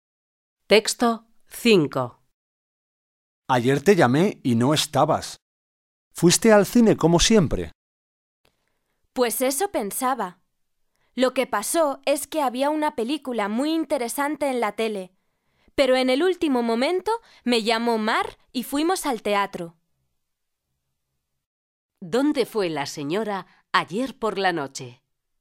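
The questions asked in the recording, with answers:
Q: ¿Dónde fue la señora ayer por la noche?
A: Al teatro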